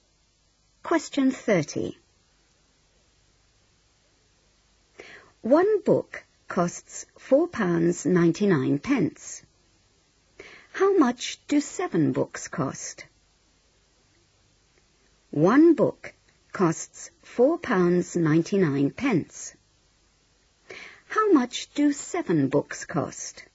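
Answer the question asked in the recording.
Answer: £34.93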